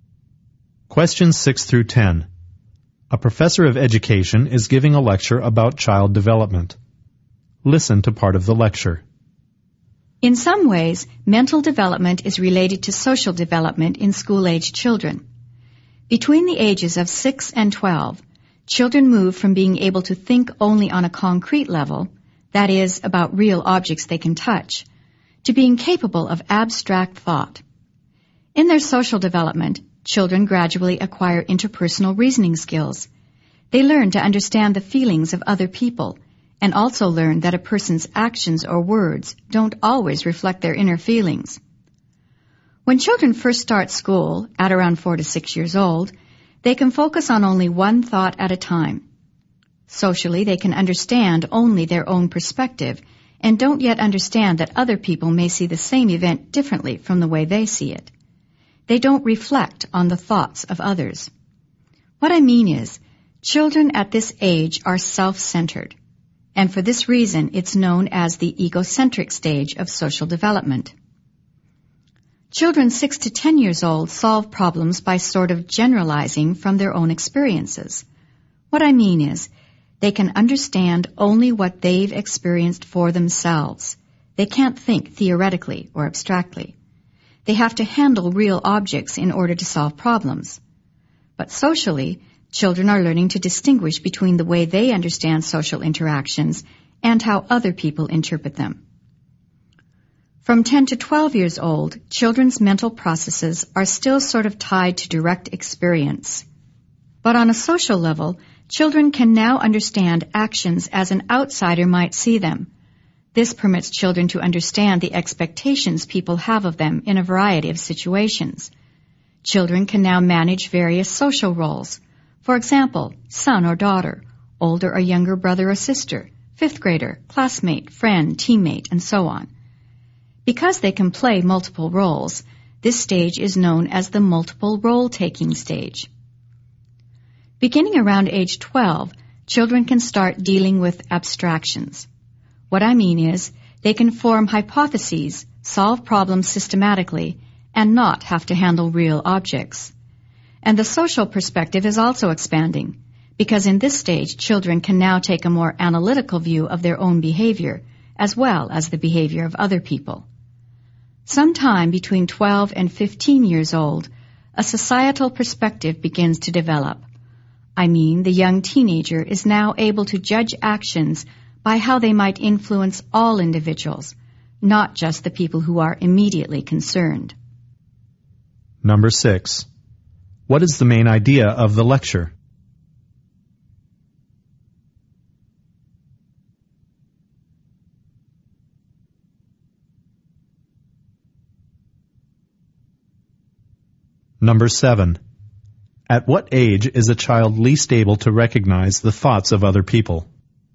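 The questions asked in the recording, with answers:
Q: At what age is a child least able to recognize the thoughts of other people?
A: About 4 to 6 years old (the egocentric stage)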